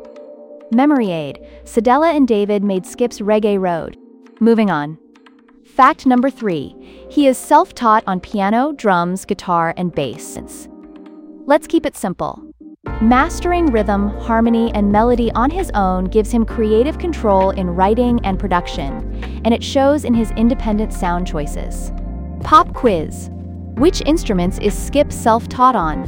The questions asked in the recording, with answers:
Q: Which instruments is Skip self-taught on?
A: Correct answer. Piano, drums, guitar, and bass.